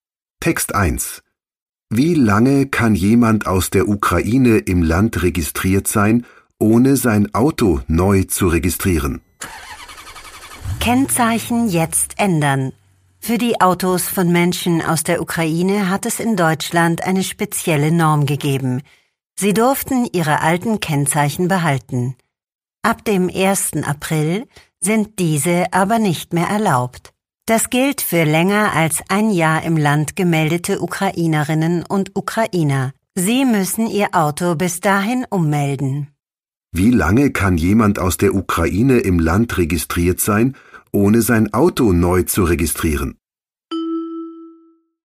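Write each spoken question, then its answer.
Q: Wie lange kann jemand aus der Ukraine im Land registriert sein, ohne sein Auto neu zu registrieren?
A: Ein Jahr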